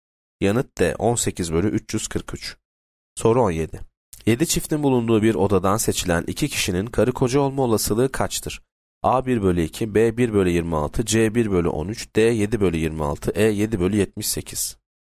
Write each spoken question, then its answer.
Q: 7 çiftin bulunduğu bir odadan seçilen iki kişinin karı koca olma olasılığı kaçtır?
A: Yanıt C 1 bölü 13.